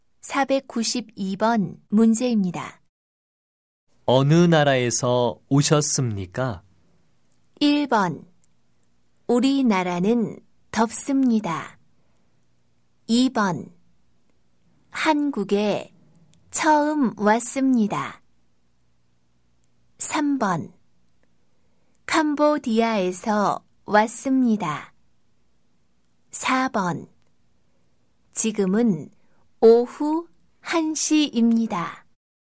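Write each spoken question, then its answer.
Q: 어느 나라에서 오셨습니까?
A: 3: 캄보디아에서 왔습니다.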